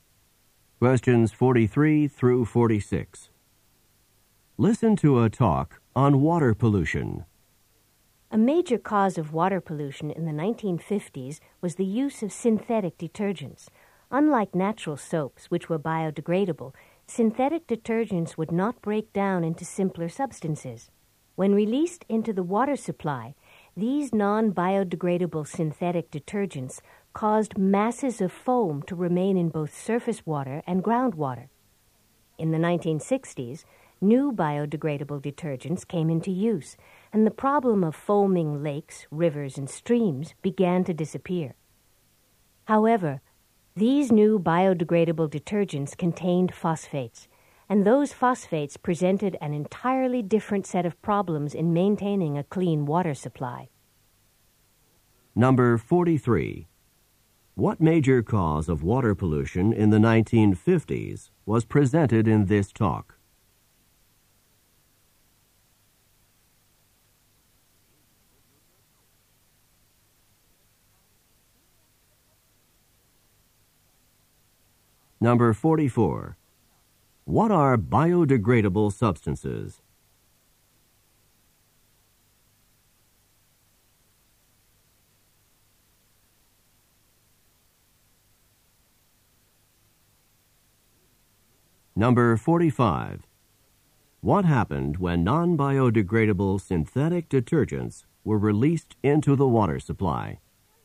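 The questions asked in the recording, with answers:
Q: What major cause of water pollution in the 1950s was presented in this talk?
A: Synthetic detergents

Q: What are biodegradable substances?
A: Substances that break down into simpler substances

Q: What happened when non-biodegradable synthetic detergents were released into the water supply?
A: Masses of foam stayed in the water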